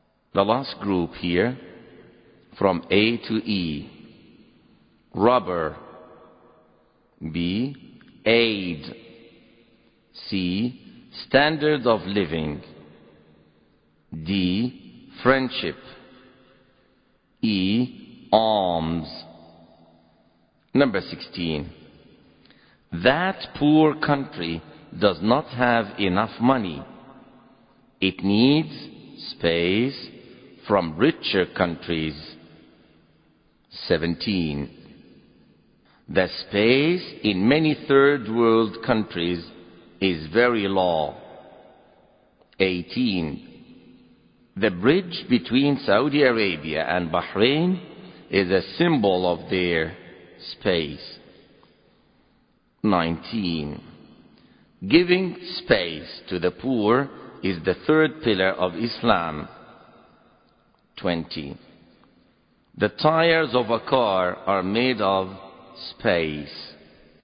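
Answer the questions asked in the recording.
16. B: aid
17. C: standard of living
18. D: friendship
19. E: alms
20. A: rubber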